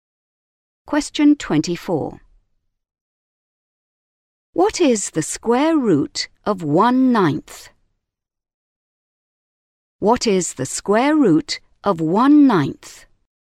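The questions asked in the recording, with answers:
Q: What is the square root of 1/9?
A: 1/3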